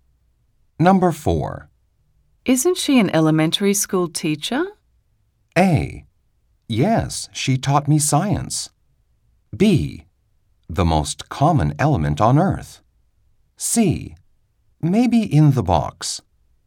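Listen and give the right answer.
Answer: A: Yes, she taught me science.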